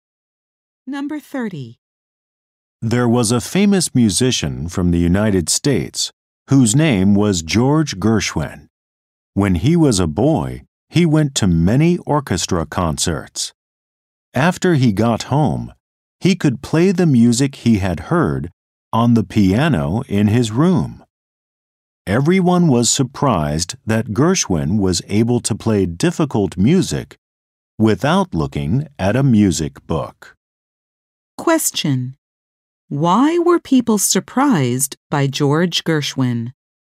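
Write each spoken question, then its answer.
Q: Why were people surprised by George Gershwin?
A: He could play difficult music without looking at a music book.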